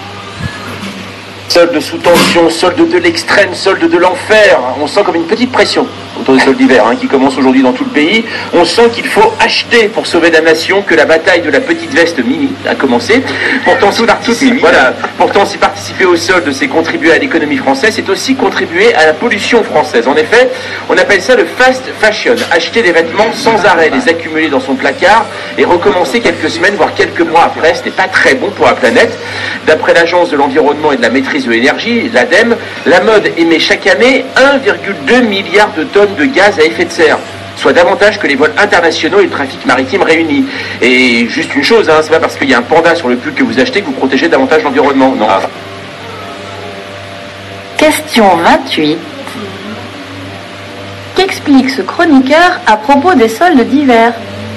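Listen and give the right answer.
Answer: Qu'acheter pendant les soldes aide l'économie française mais contribue aussi à la pollution (fast fashion mauvaise pour la planète).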